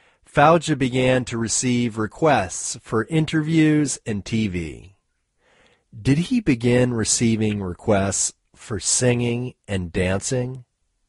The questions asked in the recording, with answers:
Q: Did he begin receiving requests for singing and dancing?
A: No, he didn't begin receiving requests for singing and dancing.